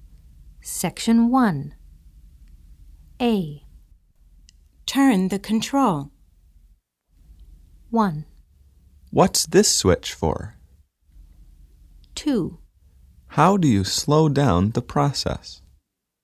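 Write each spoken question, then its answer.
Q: Turn the control.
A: 2: How do you slow down the process?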